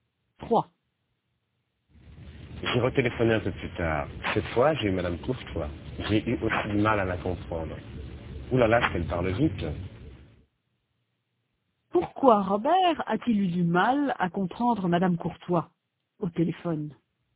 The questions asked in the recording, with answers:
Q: Pourquoi Robert a-t-il eu du mal à comprendre Madame Courtois au téléphone?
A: Parce qu'elle parle vite.